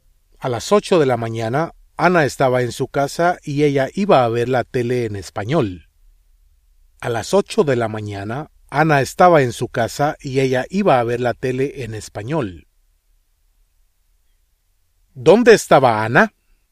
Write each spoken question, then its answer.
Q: ¿Dónde estaba Anna?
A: Anna estaba en su casa.